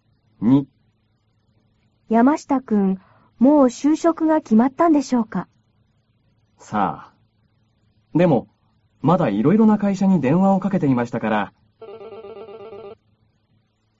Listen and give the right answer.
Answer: いろいろな会社に電話をかけていましたから、まだ決まっていないようです。